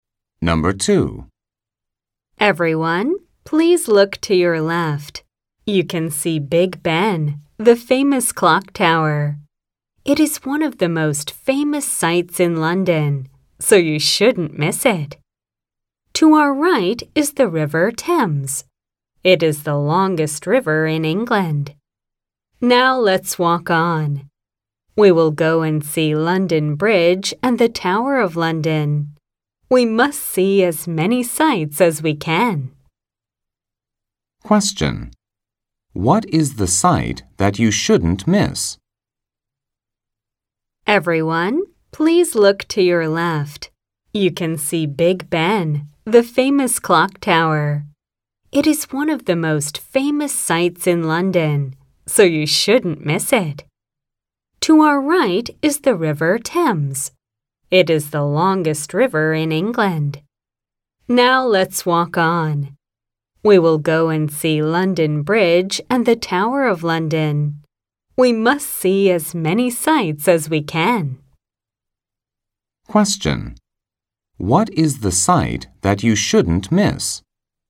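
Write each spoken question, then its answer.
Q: What is the sight that you shouldn't miss?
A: Big Ben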